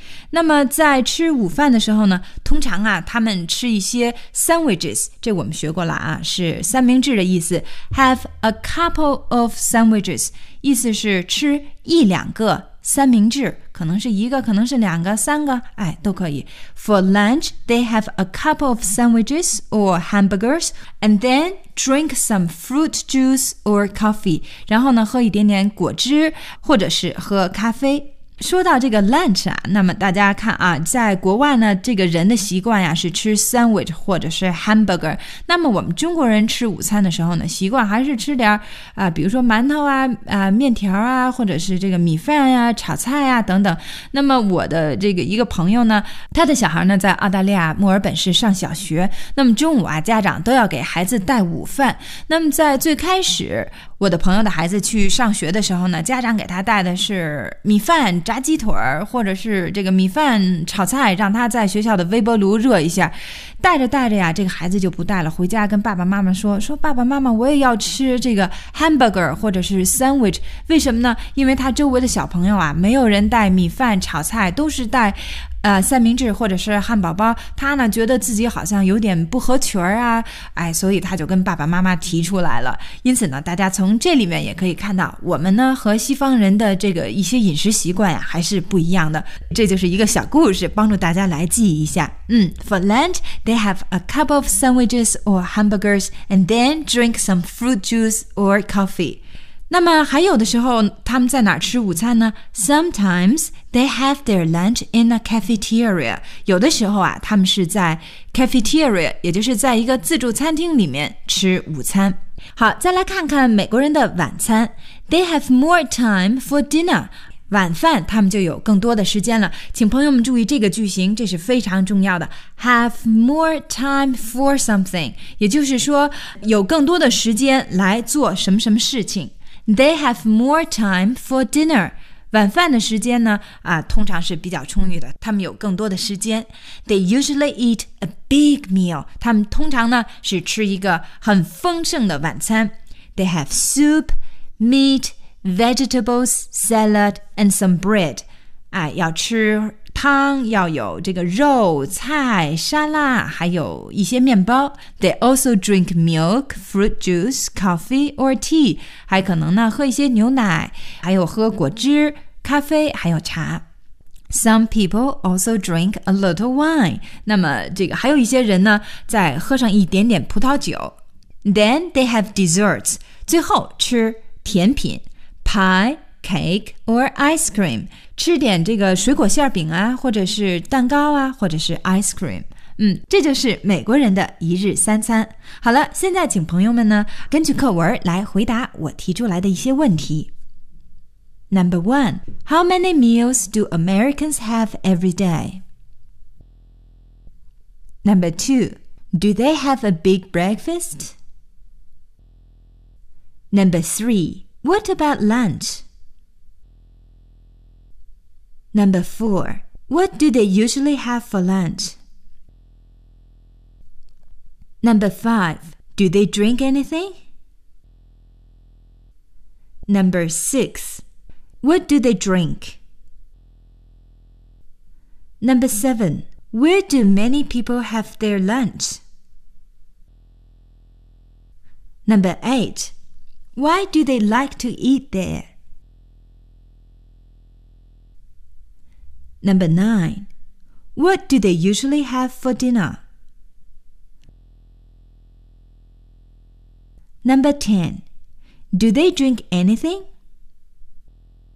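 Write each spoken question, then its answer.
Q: What do they usually have for lunch?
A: A couple of sandwiches or hamburgers

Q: Do they drink anything?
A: Yes, they do.

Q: What do they drink?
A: Fruit juice or coffee

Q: Where do many people have their lunch?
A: In a cafeteria

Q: What do they usually have for dinner?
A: They have soup, meat, vegetables, salad, and some bread.

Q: Do they drink anything?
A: Yes, they do.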